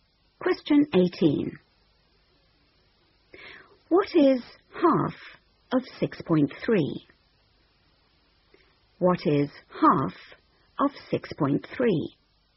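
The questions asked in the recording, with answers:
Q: What is half of 6.3?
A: 3.15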